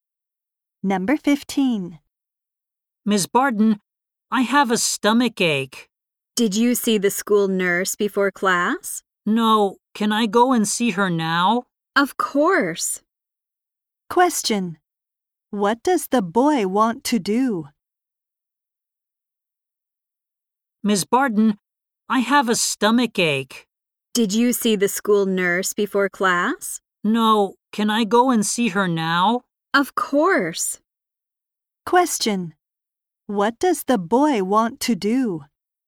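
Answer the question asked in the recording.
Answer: Go and see the school nurse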